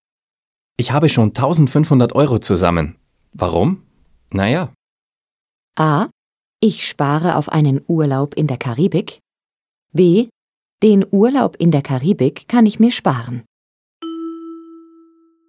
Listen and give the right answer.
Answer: A ist richtig.